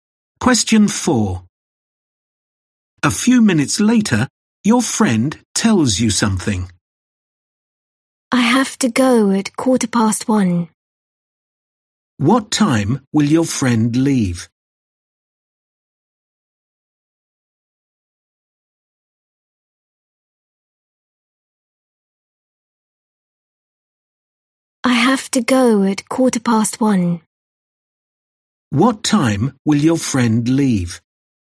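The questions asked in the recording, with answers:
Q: What time will your friend leave?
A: 1:15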